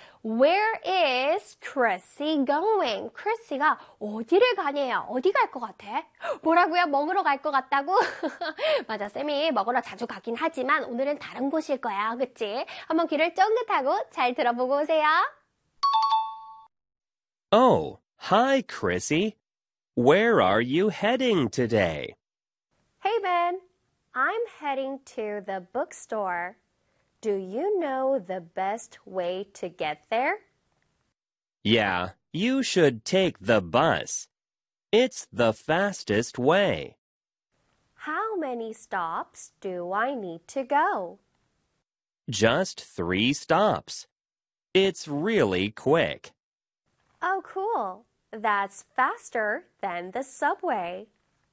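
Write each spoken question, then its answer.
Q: Where is Chrissy going?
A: To the bookstore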